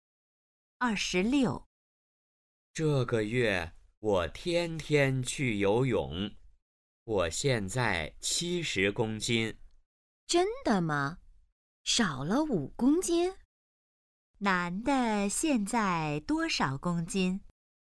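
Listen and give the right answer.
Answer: 70公斤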